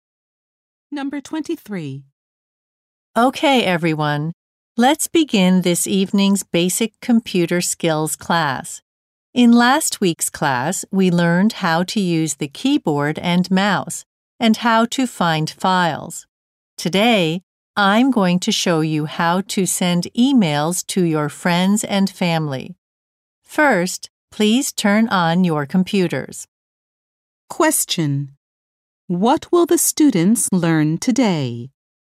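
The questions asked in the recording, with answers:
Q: What will the students learn today?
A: How to send emails.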